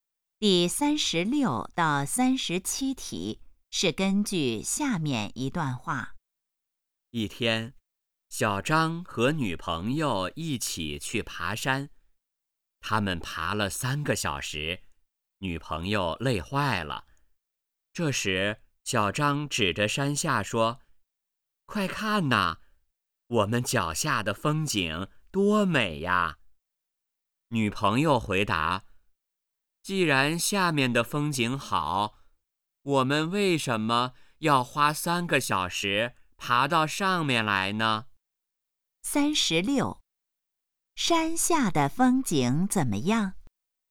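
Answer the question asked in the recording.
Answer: 很美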